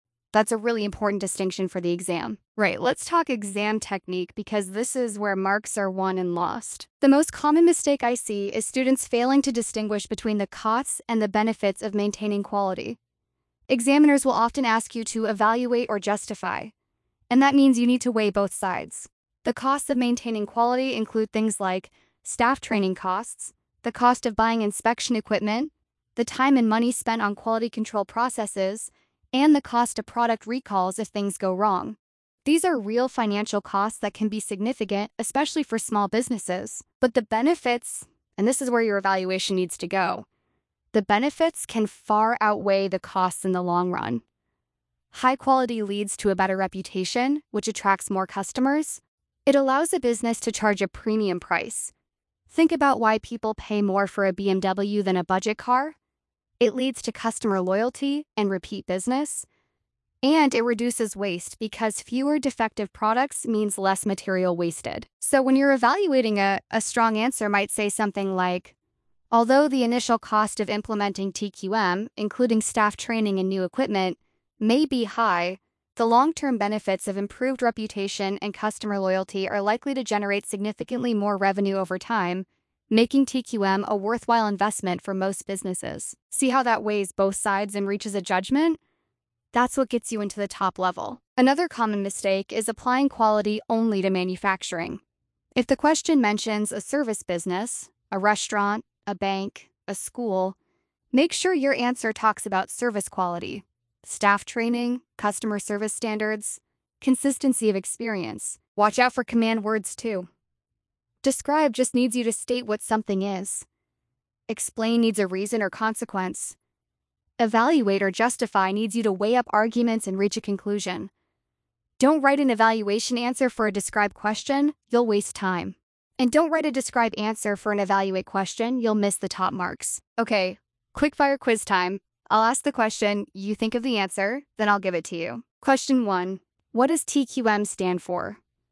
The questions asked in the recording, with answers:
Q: Question one, what does TQM stand for?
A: Total quality management.